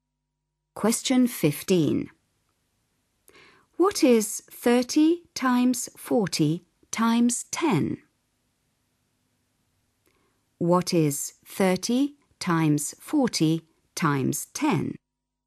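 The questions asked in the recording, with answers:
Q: What is 30 times 40 times 10?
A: 12000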